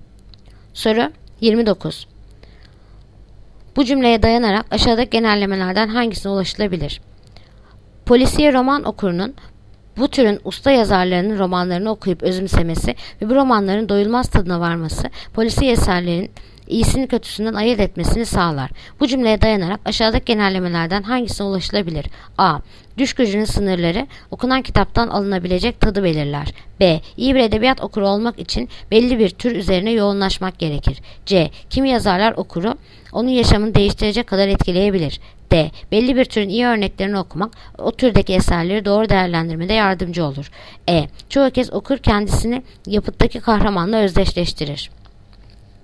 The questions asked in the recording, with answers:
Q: Bu cümleye dayanarak aşağıdaki genellemelerden hangisine ulaşılabilir?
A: Yanıt Diyarbakır. Belli bir türün iyi örneklerini okumak o türdeki eserleri doğru değerlendirmede yardımcı olur.